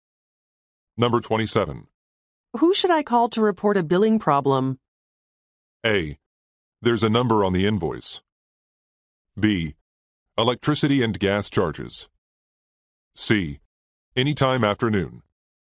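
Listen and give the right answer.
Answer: A: There's a number on the invoice.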